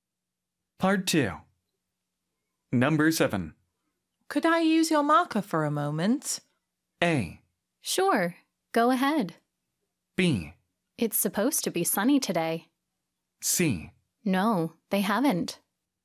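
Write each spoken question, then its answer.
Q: Could I use your marker for a moment?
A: A: Sure. Go ahead.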